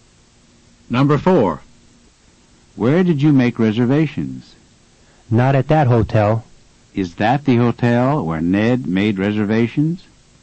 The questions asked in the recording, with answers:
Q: Is that the hotel where Ned made reservations?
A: No, it's not.